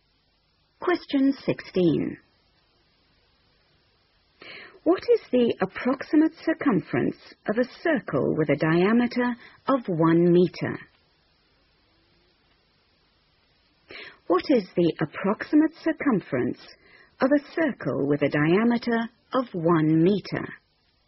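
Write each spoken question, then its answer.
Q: What is the approximate circumference of a circle with a diameter of 1 meter?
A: About 3.14 m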